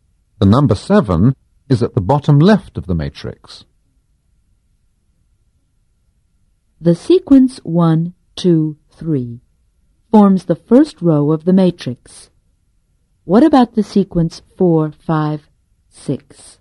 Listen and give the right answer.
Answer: The sequence 4, 5, 6 forms the second row of the matrix.